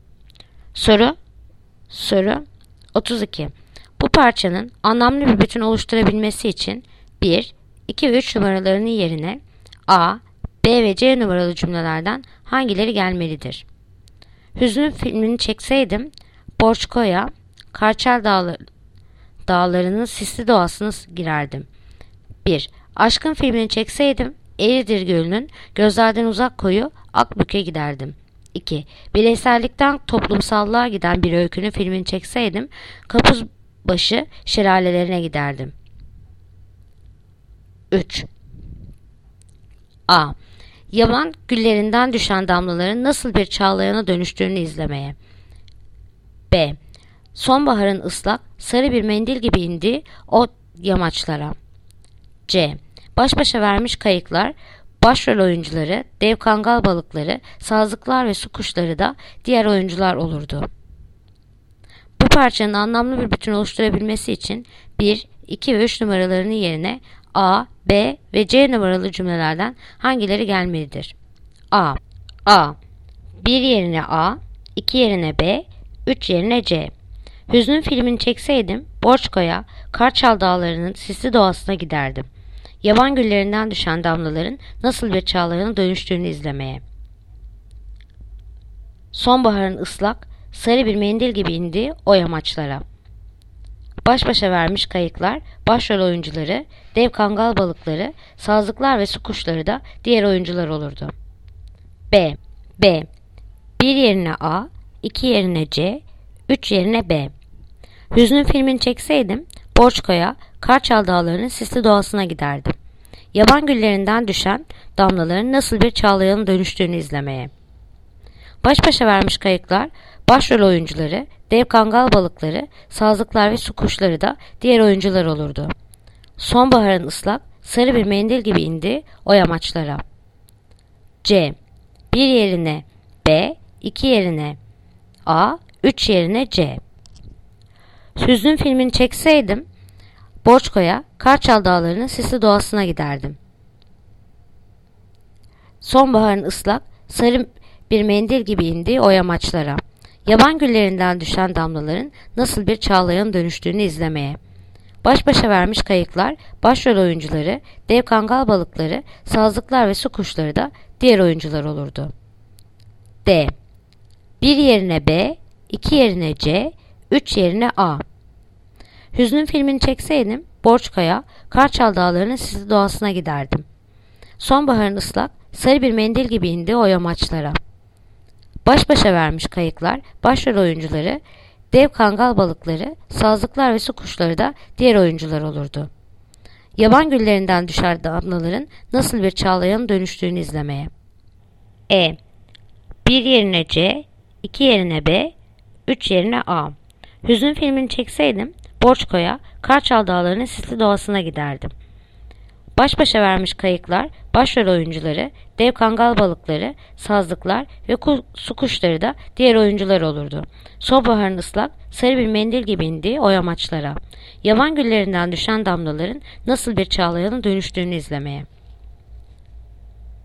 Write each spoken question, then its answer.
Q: Bu parçanın anlamlı bir bütün oluşturabilmesi için 1, 2 ve 3 numaralarının yerine A, B ve C numaralı cümlelerden hangileri gelmelidir?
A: Yanıt: Diyarbakır. 1 yerine B, 2 yerine C, 3 yerine A.